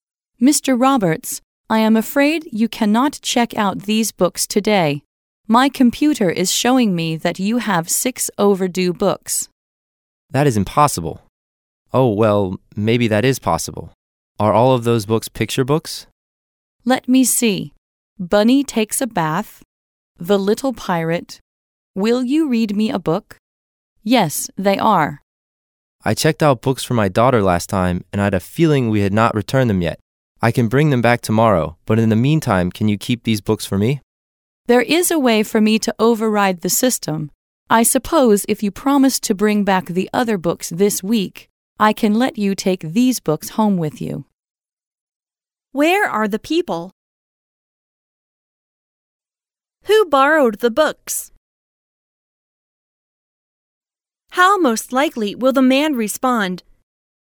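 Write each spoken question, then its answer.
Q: Where are the people?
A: At a library

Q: Who borrowed the books?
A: Mr. Roberts (the man), for his daughter

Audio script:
[听力原文] W: Mr. Roberts, I am afraid you cannot check out these books today. My computer is showing me that you have six overdue books. M: That is impossible. Oh, well, maybe that is possible. Are all of those books picture books? W: Let me see. Bunny Takes a Bath... The Little Pirate ... Will You Read Me a Book?... Yes, they are. M: I checked out books for my daughter last time and I had a feeling we had not returned them yet. I can bring them back tomorrow, but in the meantime, can you keep these books for me? W: There is a way for me to override the system. I suppose if you promise to bring back the other books this week, I can let you take these books home with you.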